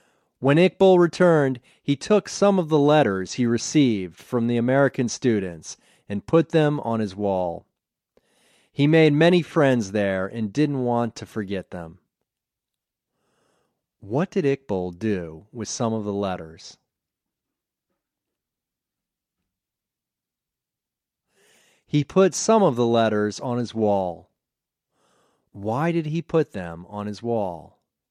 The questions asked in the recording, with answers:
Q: Why did he put them on his wall?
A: He didn't want to forget his American friends.